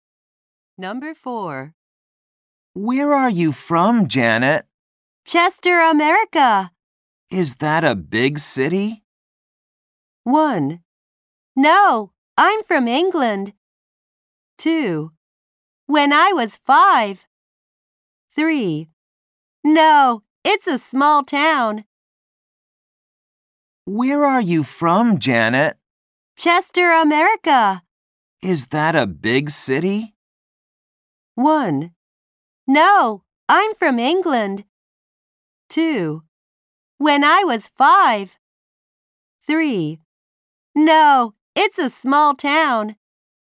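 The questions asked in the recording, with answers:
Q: Is that a big city?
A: 3: No, it's a small town.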